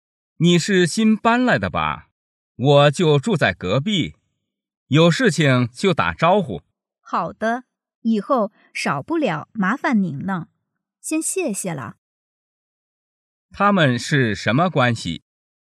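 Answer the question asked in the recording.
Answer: 邻居

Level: 汉语水平考试(MHK)三级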